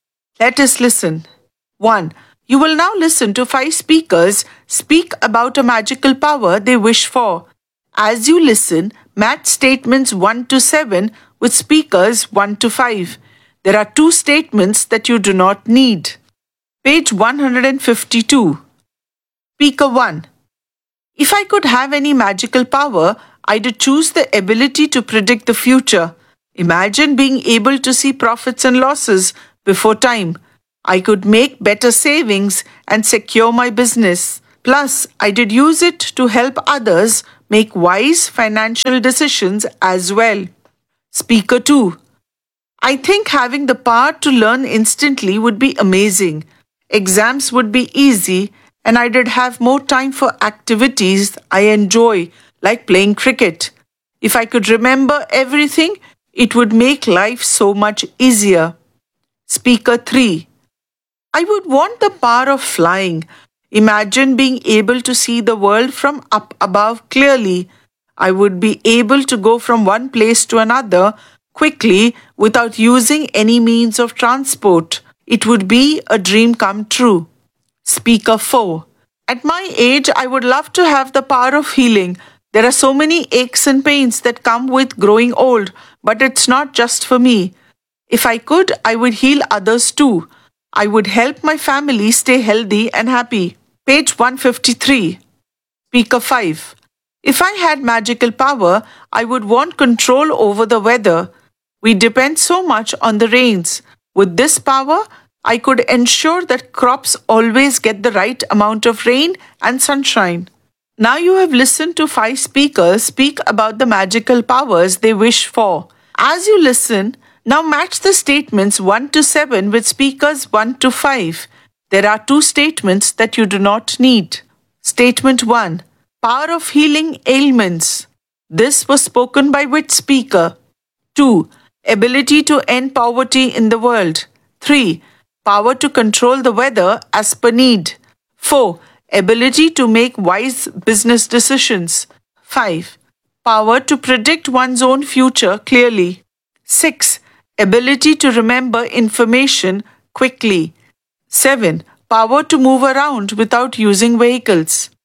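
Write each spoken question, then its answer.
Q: Statement 1. Power of healing ailments. This was spoken by which speaker?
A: Speaker 4

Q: 2. Ability to end poverty in the world.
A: Not needed (no speaker)

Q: 3. Power to control the weather as per need.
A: Speaker 5

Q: 4. Ability to make wise business decisions.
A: Speaker 1

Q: 6. Ability to remember information quickly.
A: Speaker 2

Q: 7. Power to move around without using vehicles.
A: Speaker 3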